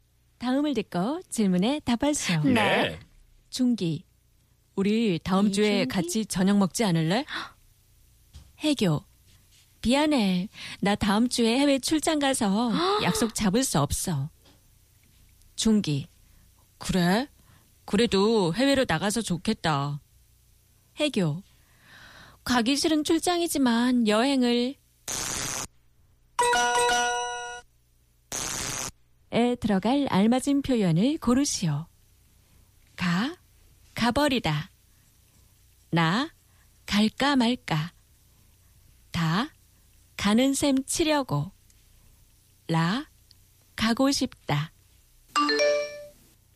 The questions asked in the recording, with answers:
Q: 에 들어갈 알맞은 표현을 고르시오.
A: 다, I guess, apparently.